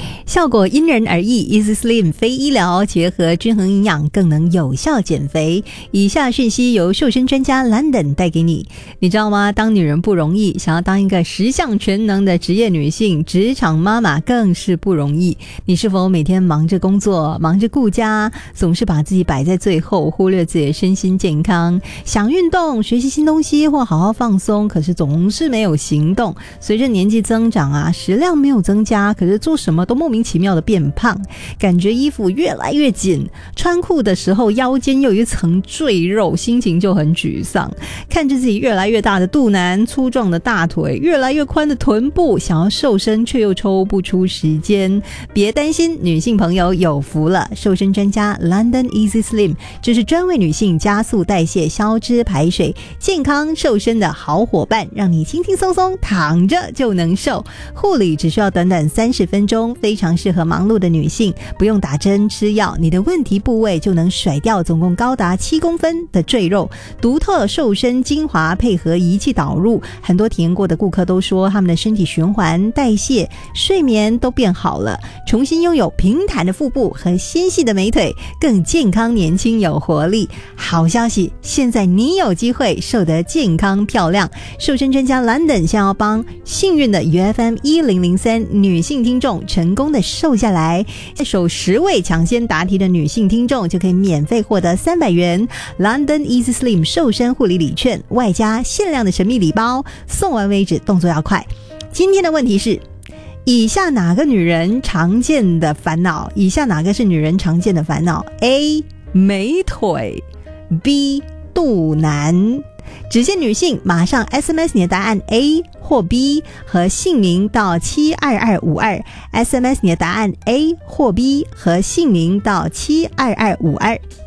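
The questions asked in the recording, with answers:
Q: 以下哪个是女人常见的烦恼 ?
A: B: 肚腩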